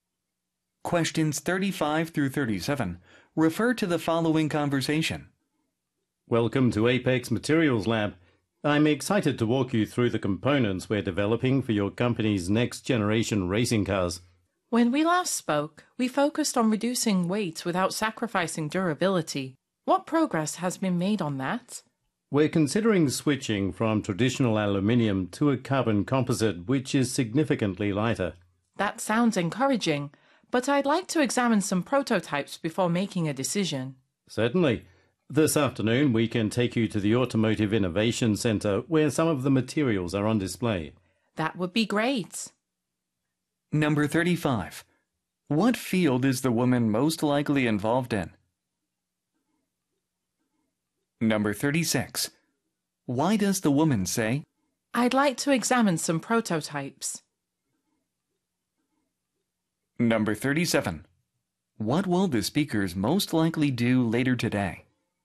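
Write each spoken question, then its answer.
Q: What field is the woman most likely involved in?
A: Automotive (racing cars)

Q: What will the speakers most likely do later today?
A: Visit the Automotive Innovation Center to see materials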